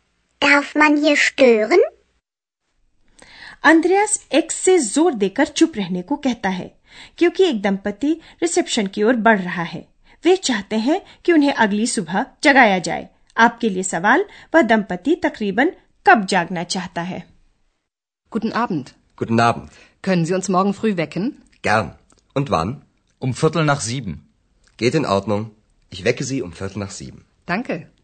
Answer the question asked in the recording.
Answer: वह दंपति तकरीबन सात बजे उठना चाहता है ठीक ठीक कहें तो सात बजकर पंद्रह minute पर